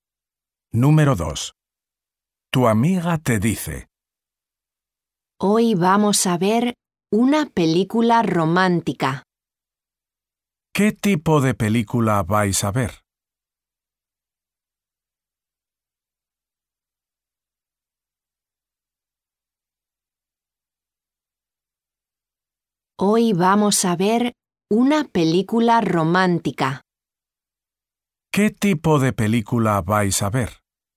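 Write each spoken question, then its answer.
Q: ¿Qué tipo de película vais a ver?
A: una película romántica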